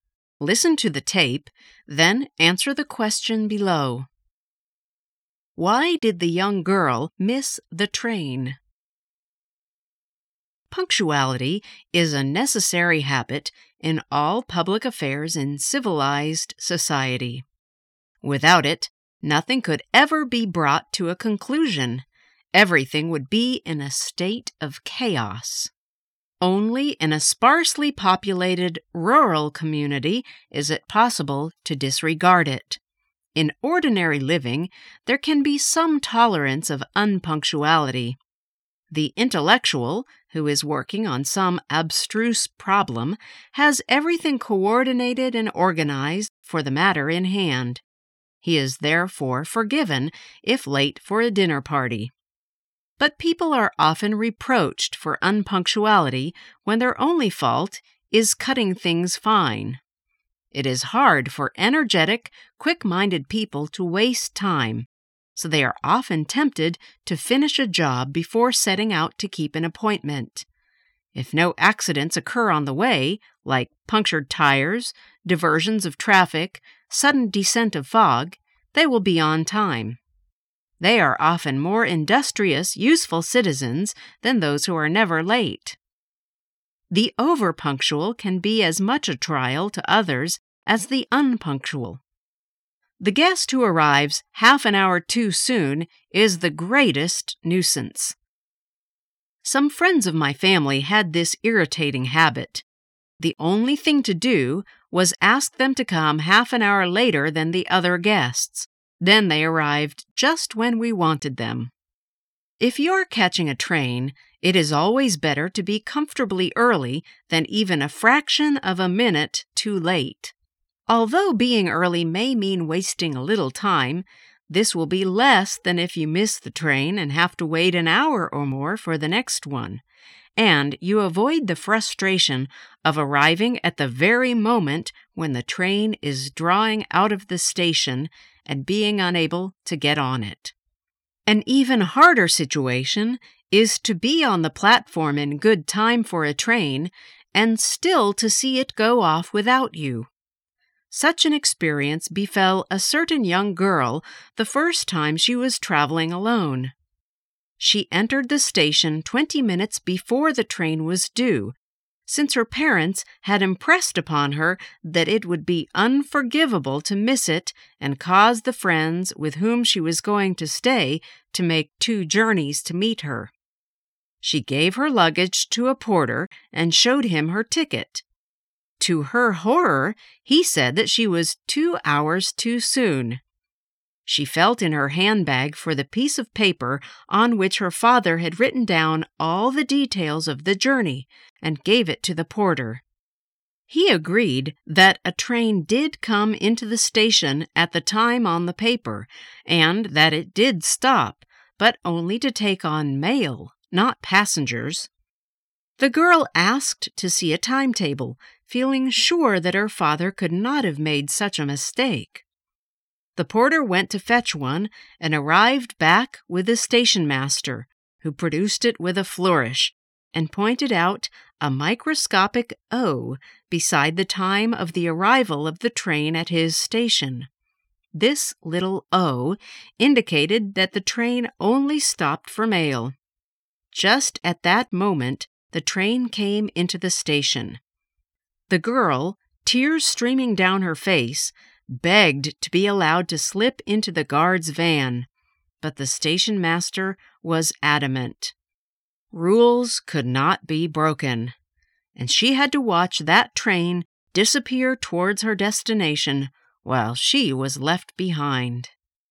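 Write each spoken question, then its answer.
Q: Why did the young girl miss the train?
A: The train only stopped there for mail, not passengers, so she wasn't allowed to board it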